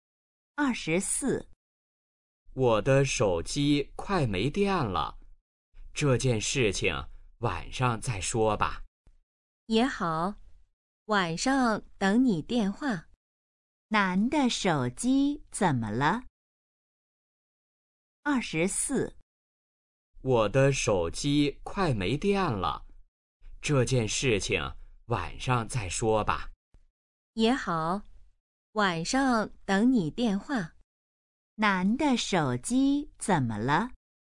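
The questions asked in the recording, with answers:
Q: 男的手机怎么了?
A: 快没电了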